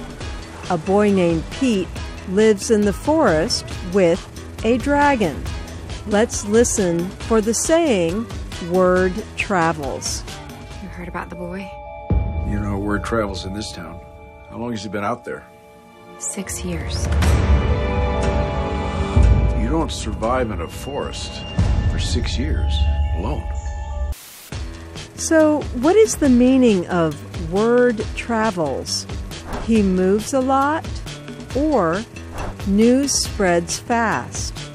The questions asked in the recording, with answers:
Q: So, what is the meaning of word travels?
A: Word travels means news spreads fast.